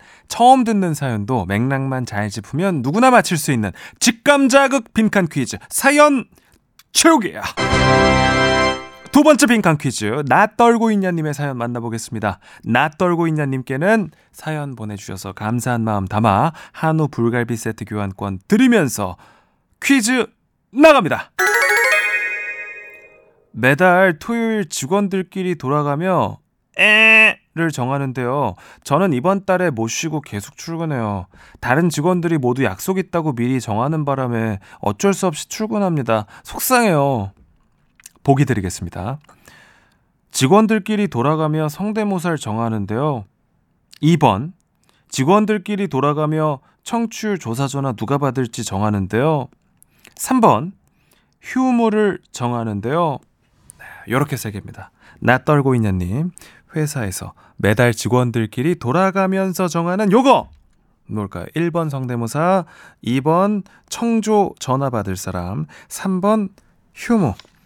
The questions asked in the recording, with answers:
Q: 나 떨고 있냐님 회사에서 매달 직원들끼리 돌아가면서 정하는 요거 뭘까요?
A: 정답은 3번 휴무였습니다.